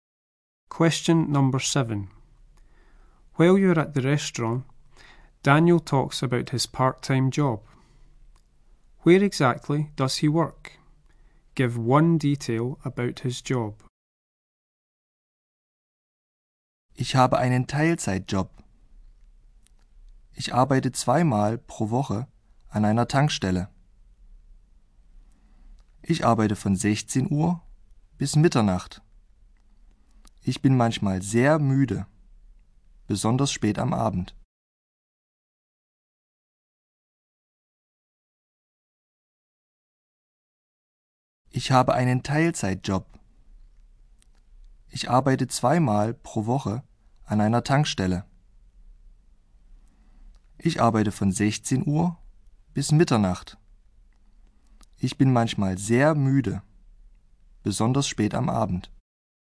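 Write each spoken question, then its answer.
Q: Where exactly does he work?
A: At a petrol station

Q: Give one detail about his job.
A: Twice a week, 4pm to midnight; sometimes very tired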